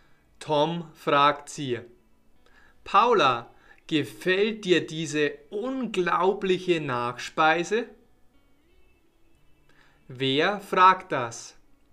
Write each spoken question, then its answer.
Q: Wer fragt das?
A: Tom. Tom fragt das.